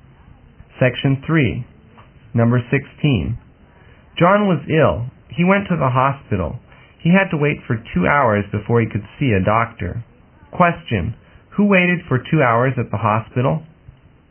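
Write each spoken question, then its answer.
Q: Who waited for 2 hours at the hospital?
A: John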